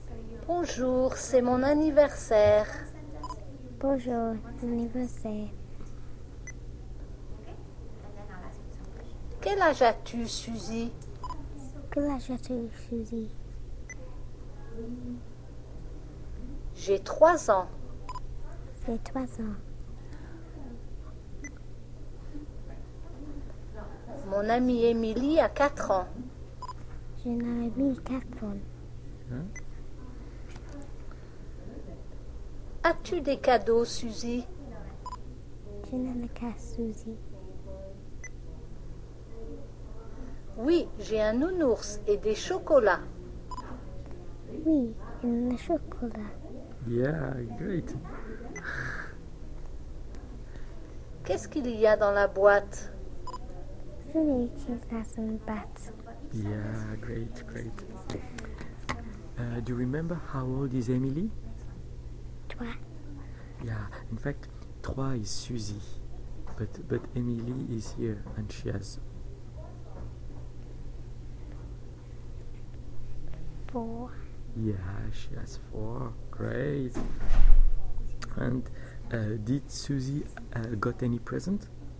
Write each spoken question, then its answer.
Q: Do you remember how old is Emily?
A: she has 4